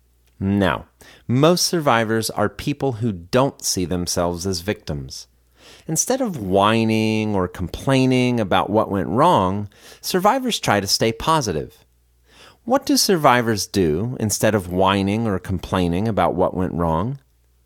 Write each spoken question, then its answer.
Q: What do survivors do instead of whining or complaining about what went wrong?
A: Survivors try to stay positive instead of whining or complaining about what went wrong.